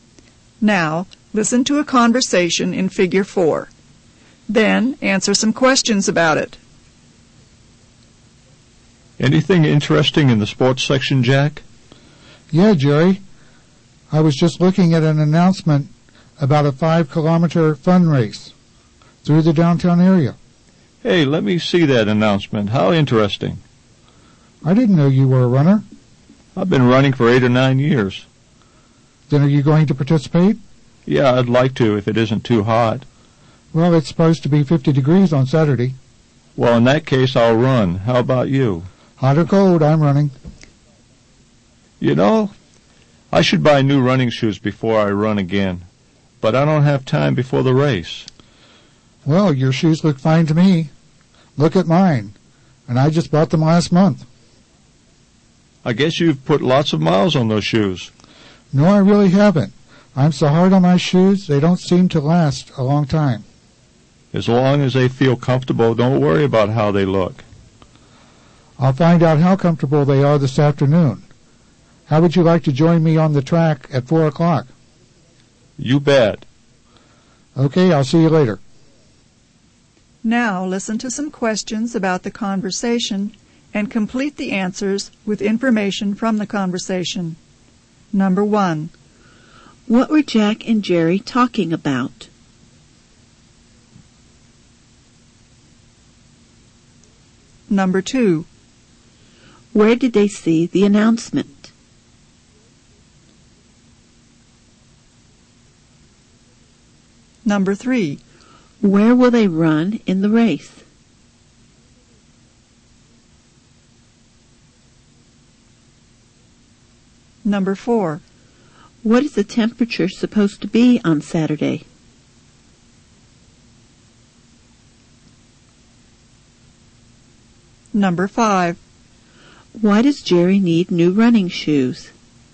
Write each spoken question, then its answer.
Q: What were Jack and Jerry talking about?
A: They were talking about running.

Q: Where did they see the announcement?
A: They saw the announcement in the newspaper.

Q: Where will they run in the race?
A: They will run downtown.

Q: What is the temperature supposed to be on Saturday?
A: The temperature is supposed to be 50 degrees.